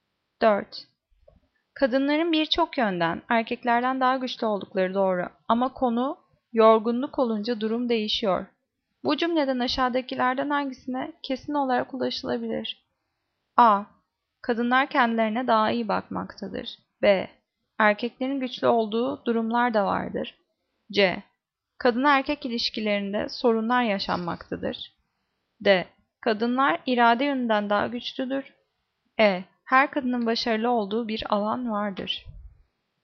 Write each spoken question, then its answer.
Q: Bu cümleden aşağıdakilerden hangisine kesin olarak ulaşılabilir?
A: Cevap B. Erkeklerin güçlü oldukları durumlar da vardır.